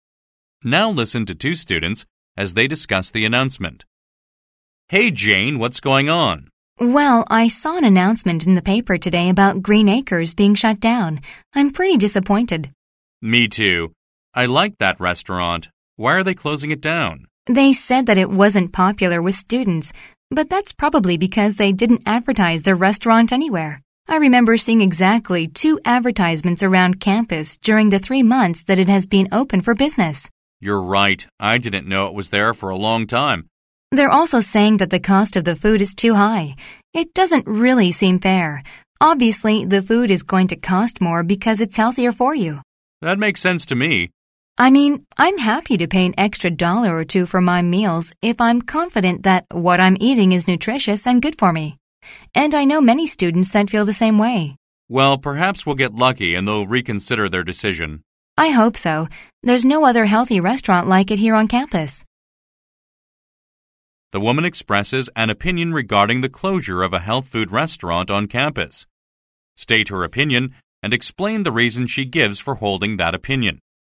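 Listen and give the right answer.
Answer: She disagrees with the closure: it was unpopular only because it was hardly advertised, and healthy food naturally costs more, which many students are happy to pay.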